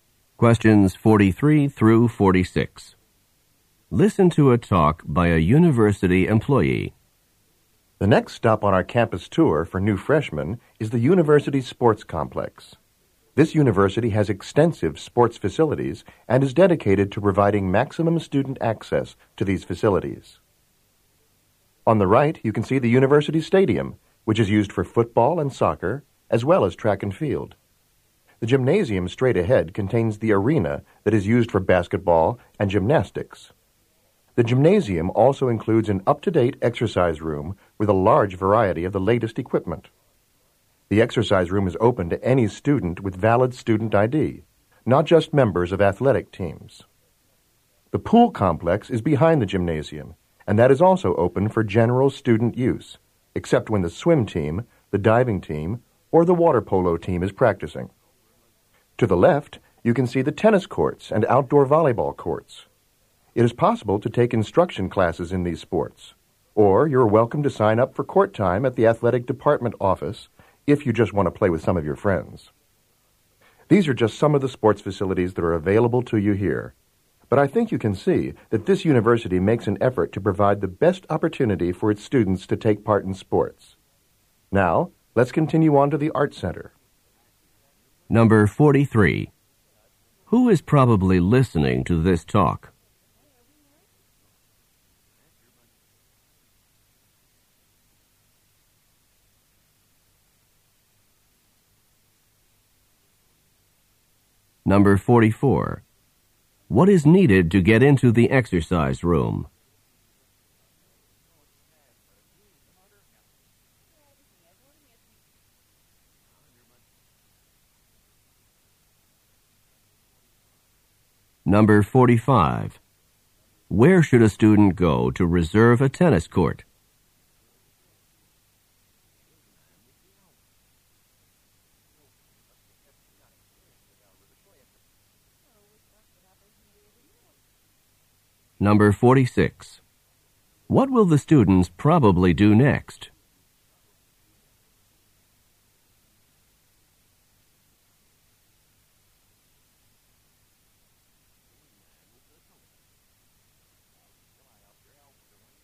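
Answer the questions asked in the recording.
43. New freshmen
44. A valid student ID
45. The athletic department office
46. Go to the Art Center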